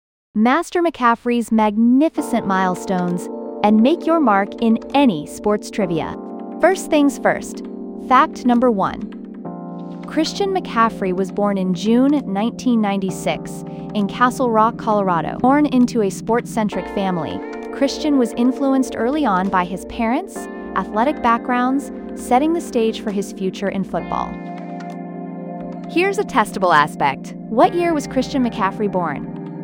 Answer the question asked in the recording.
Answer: Correct answer, 1996.